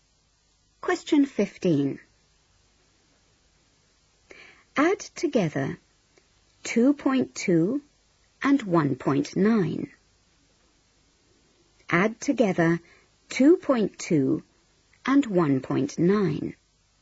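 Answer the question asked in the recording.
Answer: 4.1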